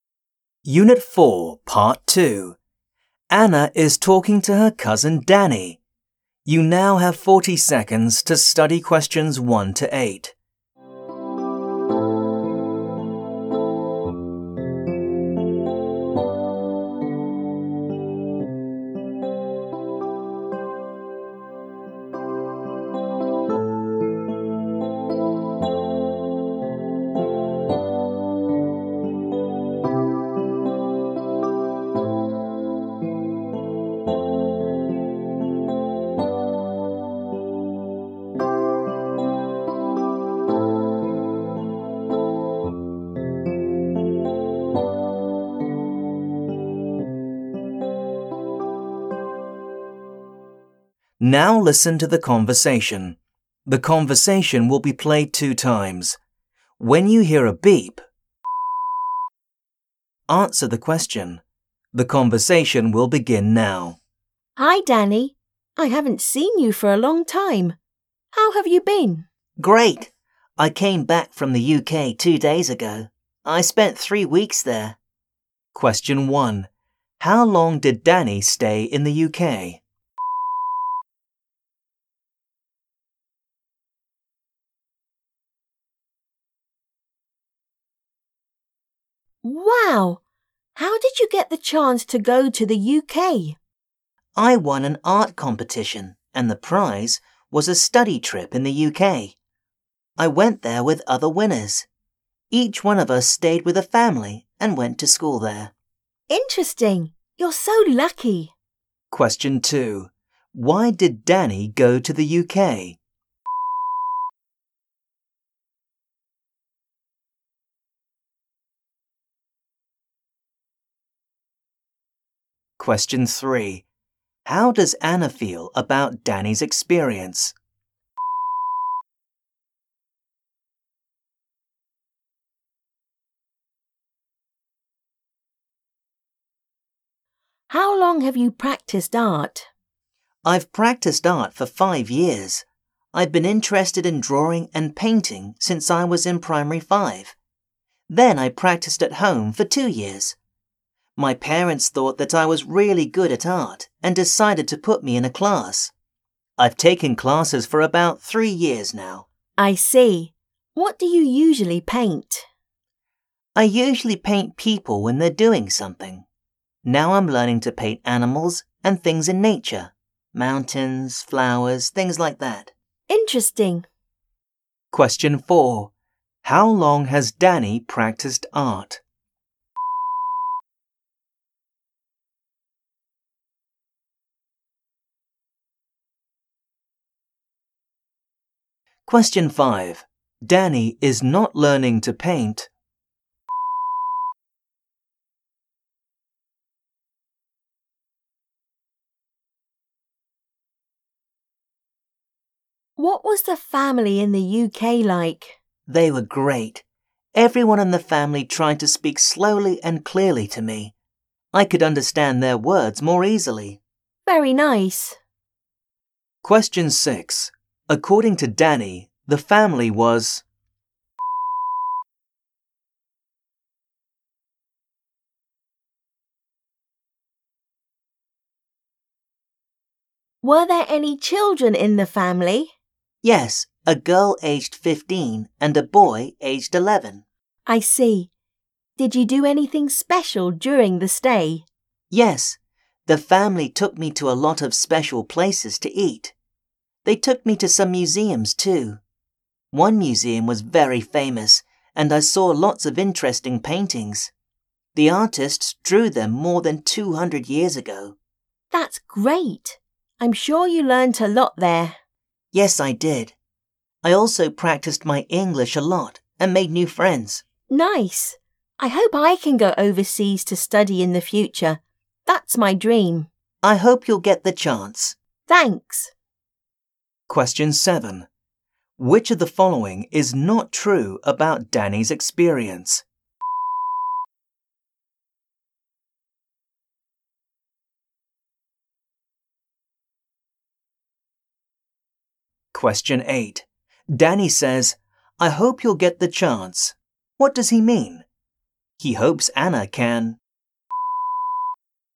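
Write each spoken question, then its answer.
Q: How long did Danny stay in the UK?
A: 3 weeks

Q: Why did Danny go to the UK?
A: He won an art competition and the prize was a study trip in the UK

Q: How does Anna feel about Danny's experience?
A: She thinks he is lucky

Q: How long has Danny practiced art?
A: 5 years

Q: According to Danny, the family was...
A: great; they spoke slowly and clearly to him

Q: Danny says, "I hope you'll get the chance." What does he mean? He hopes Anna can...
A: go overseas to study in the future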